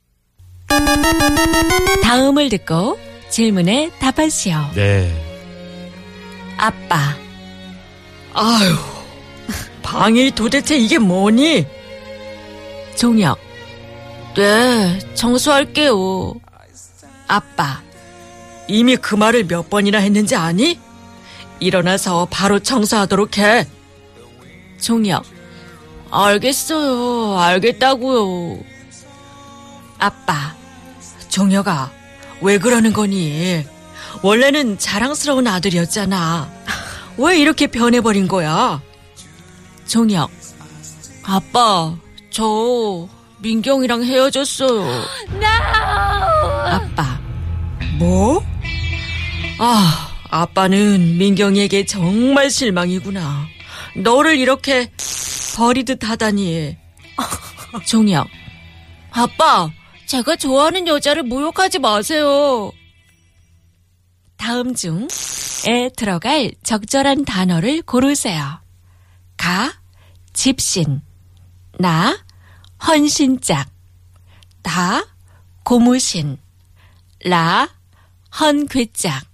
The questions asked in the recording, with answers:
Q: 다음 중에 들어갈 적절한 단어를 고르세요.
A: 나 너를 이렇게 헌신작 버리듯 하다니.